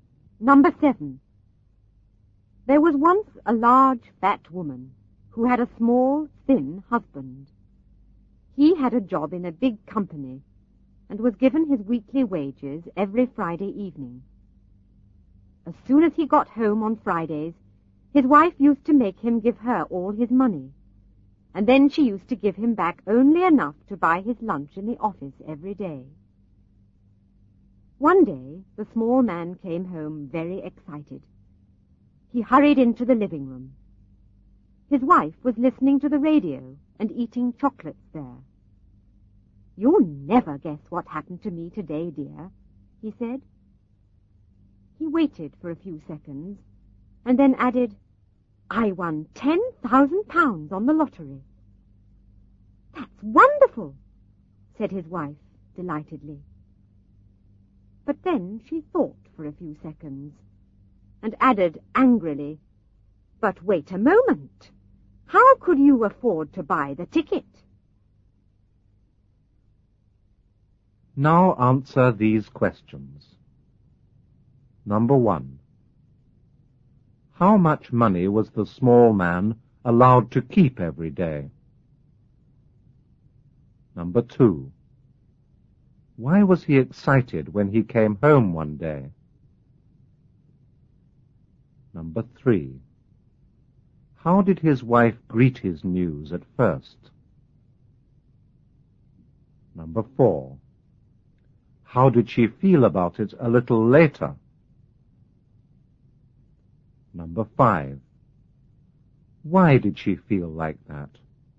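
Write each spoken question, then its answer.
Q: How much money was the small man allowed to keep every day?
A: Only enough to buy his lunch in the office

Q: Why was he excited when he came home one day?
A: He had won £10,000 on the lottery

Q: How did his wife greet his news at first?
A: Delightedly; she said it was wonderful

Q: How did she feel about it a little later?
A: Angry

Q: Why did she feel like that?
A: She wondered how he could afford the ticket, since she took all his money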